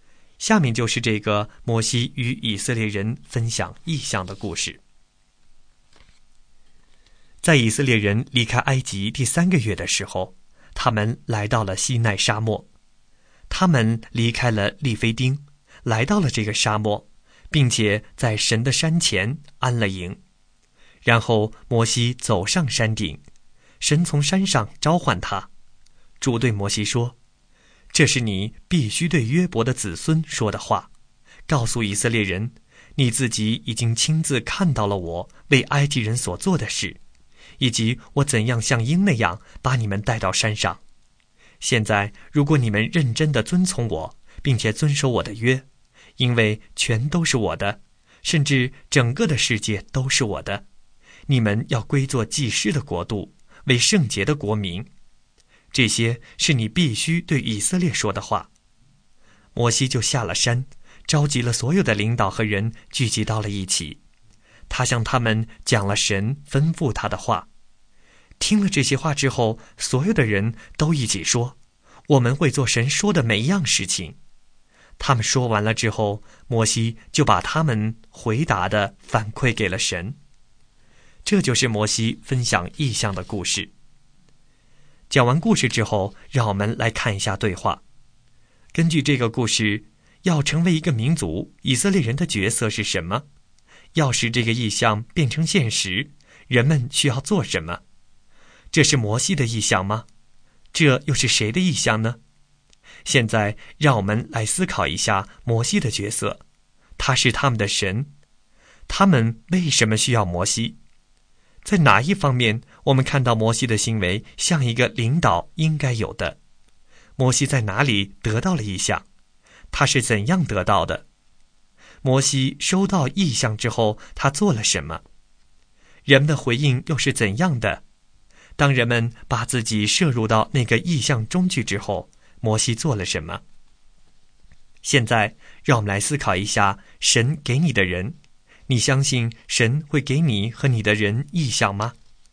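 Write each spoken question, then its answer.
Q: 要使这个意象变成现实,人们需要做什么?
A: 认真遵从神,遵守神的约

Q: 这是摩西的意象吗?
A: 不是

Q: 这又是谁的意象呢?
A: 神的意象

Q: 摩西在哪里得到了意象?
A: 在山上(西奈沙漠中神的山)

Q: 他是怎样得到的?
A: 神从山上召唤他,对他说话

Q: 摩西收到意象之后他做了什么?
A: 下山召集领导和众人,向他们讲了神吩咐的话

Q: 人们的回应又是怎样的?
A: 都说会做神说的每一样事情

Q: 当人们把自己摄入到那个意象中去之后,摩西做了什么?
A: 把人们的回答反馈给了神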